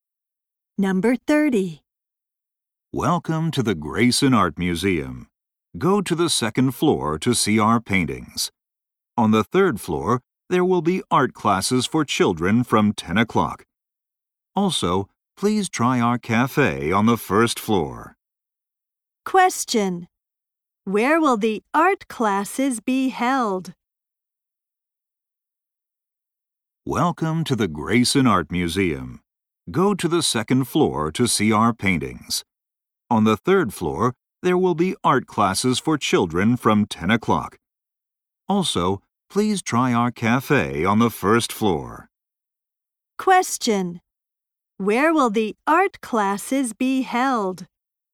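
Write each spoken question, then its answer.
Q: Where will the art classes be held?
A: On the third floor.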